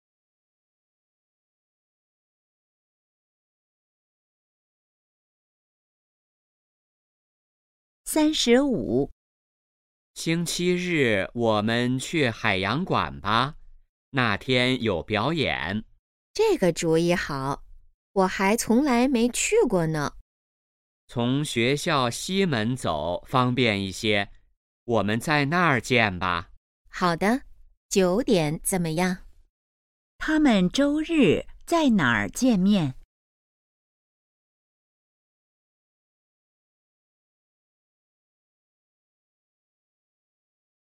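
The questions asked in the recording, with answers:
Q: 他们周日在哪儿见面?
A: 学校西门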